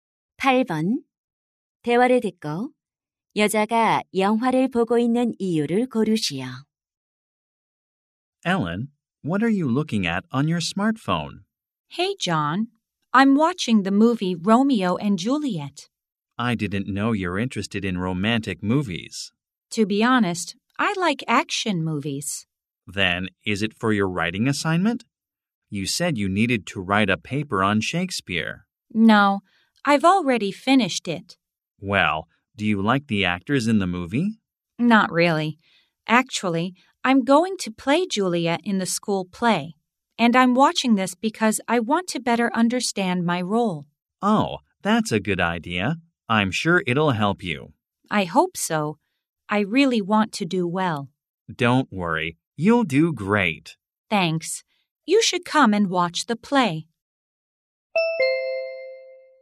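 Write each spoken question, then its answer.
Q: 대화를 듣고 여자가 영화를 보고 있는 이유를 고르시오.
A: 학교 연극에서 맡은 줄리엣 역할을 더 잘 이해하려고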